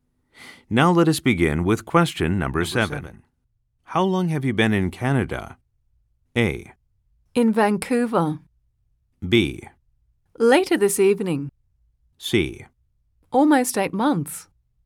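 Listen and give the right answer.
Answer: C: Almost 8 months.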